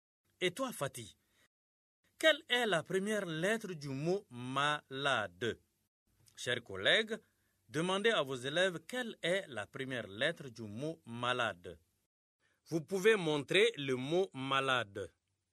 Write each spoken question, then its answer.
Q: Et toi, Fatih, quelle est la première lettre du mot malade?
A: Malade, c'est M comme Moussa.